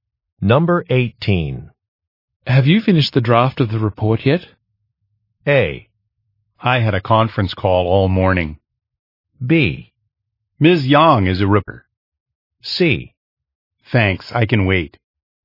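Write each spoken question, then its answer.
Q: Have you finished the draft of the report yet?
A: A: I had a conference call all morning.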